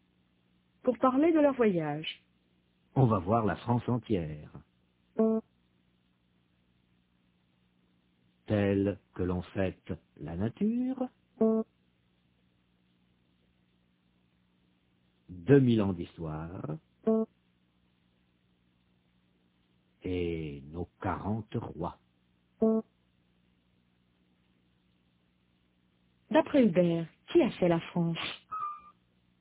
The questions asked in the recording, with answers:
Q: D'après Hubert, qui a fait la France?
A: La nature, 2000 ans d'histoire et 40 rois.